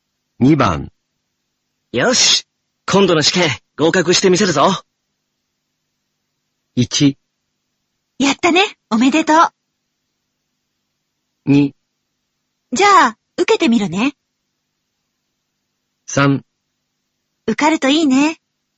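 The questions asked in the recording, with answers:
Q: よし、今度の試験合格してみせるぞ。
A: 3: 受かるといいね。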